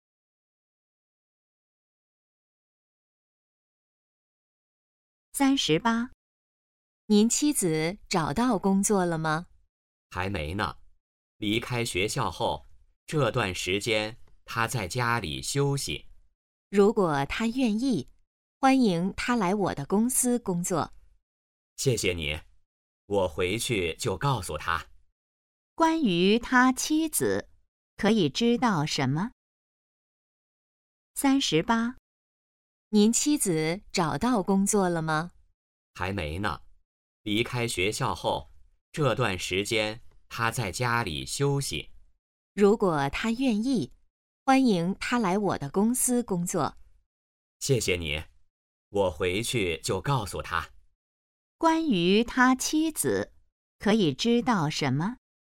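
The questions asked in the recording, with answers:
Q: 关于他妻子,可以知道什么?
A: 还没找到工作,在家休息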